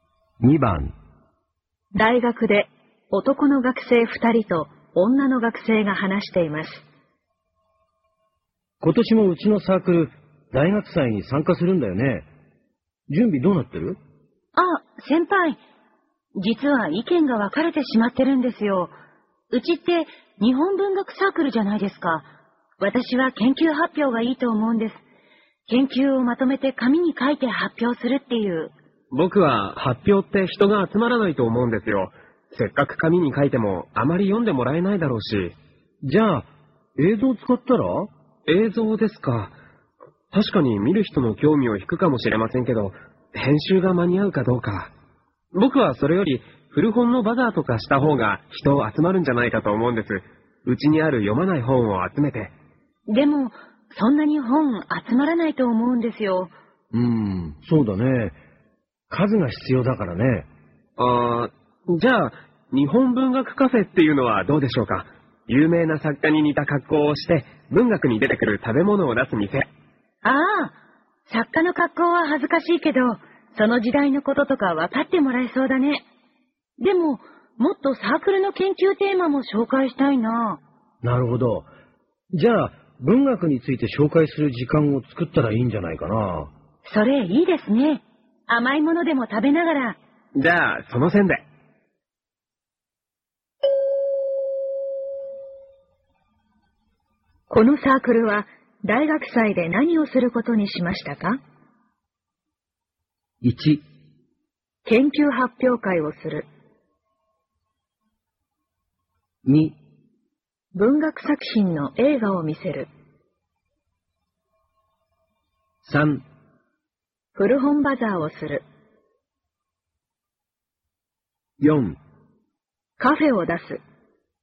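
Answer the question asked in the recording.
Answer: 4: カフェを出す。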